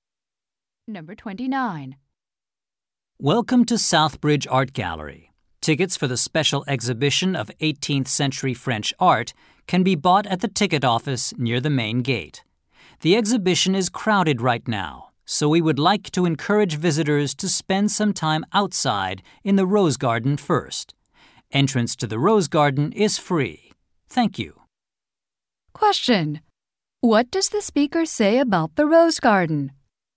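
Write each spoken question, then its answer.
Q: What does the speaker say about the Rose Garden?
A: Entrance is free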